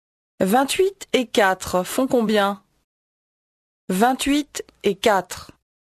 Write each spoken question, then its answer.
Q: 28 et 4 font combien?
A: 32.